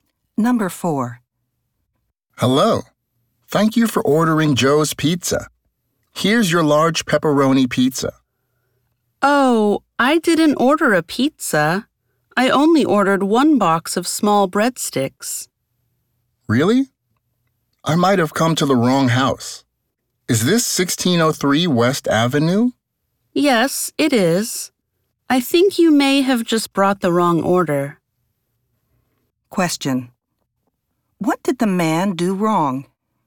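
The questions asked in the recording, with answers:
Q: what did the man do wrong?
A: He brought the wrong order (a large pepperoni pizza instead of small breadsticks).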